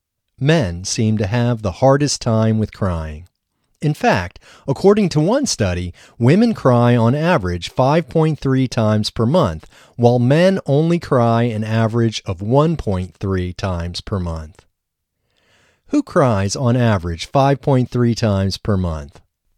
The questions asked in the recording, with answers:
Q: Who cries on average 5.3 times per month?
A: Women cry on average 5.3 times per month.